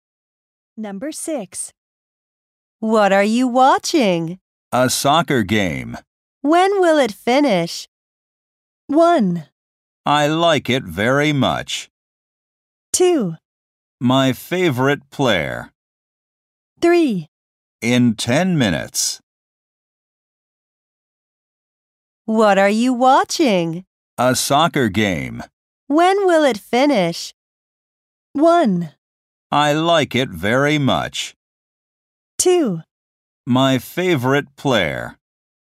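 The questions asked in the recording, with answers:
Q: When will it finish?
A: 3: In 10 minutes.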